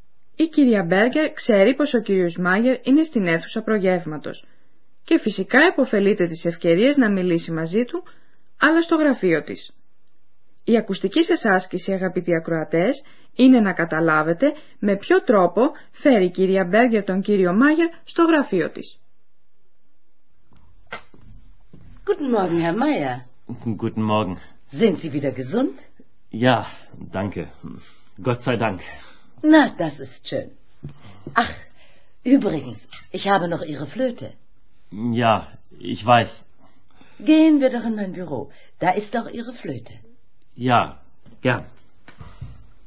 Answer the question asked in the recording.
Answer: Η κυρία Μπέγκερ, όπως ίσως θυμόσαστε, έχει το φλάουτο του κυρίου Μάγερ, φυλαγμένο στο γραφείο της.